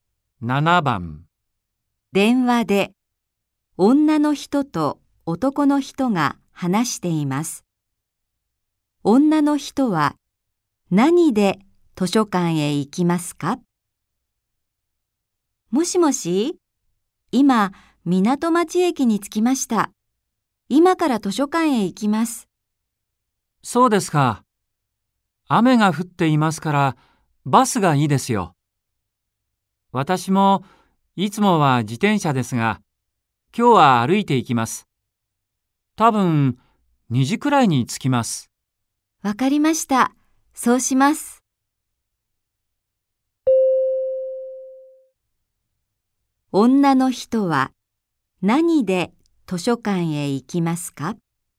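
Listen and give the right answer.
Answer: バス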